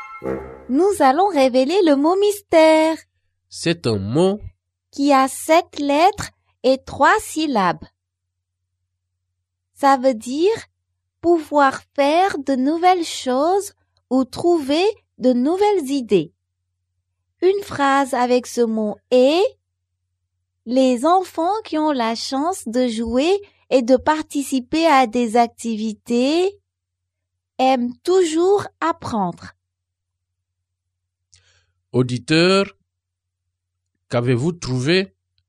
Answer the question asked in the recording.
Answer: Le mot mystère est créatif.